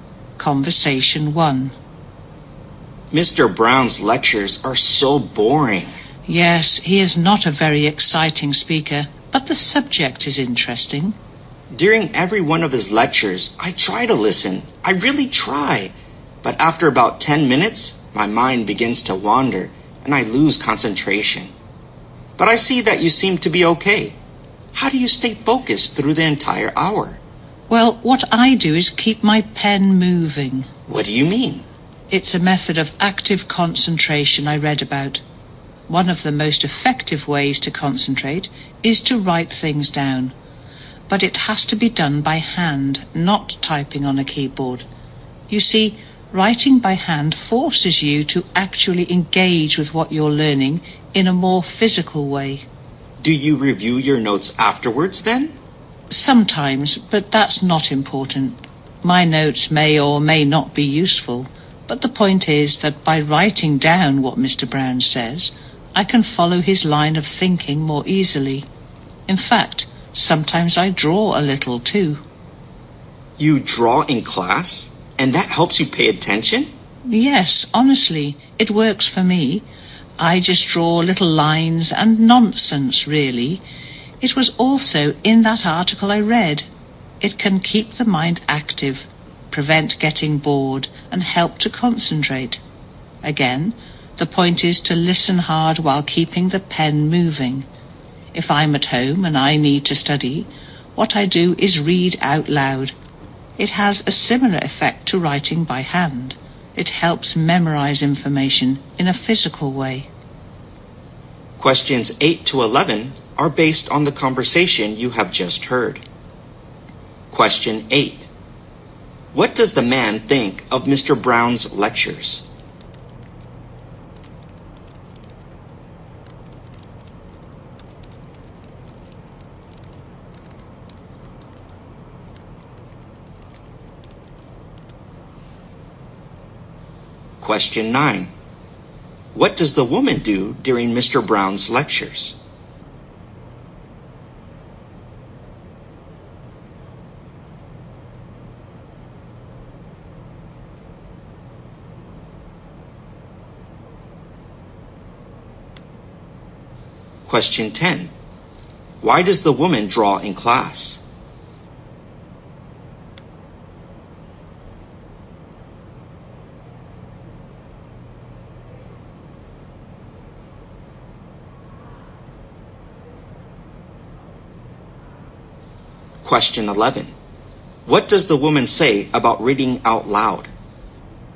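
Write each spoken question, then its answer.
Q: What does the man think of Mr. Brown's lectures?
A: They are boring

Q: What does the woman do during Mr. Brown's lectures?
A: She keeps her pen moving by writing notes by hand

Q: Why does the woman draw in class?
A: It keeps her mind active and helps her concentrate

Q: What does the woman say about reading out loud?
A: It helps her memorize information, like writing by hand does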